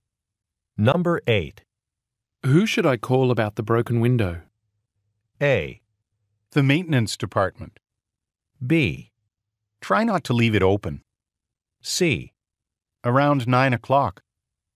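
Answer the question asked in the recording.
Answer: A: The maintenance department.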